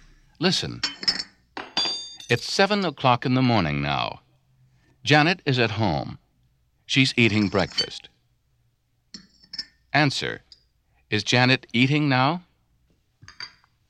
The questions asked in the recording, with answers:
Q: Is Janet eating now?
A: Yes, she is.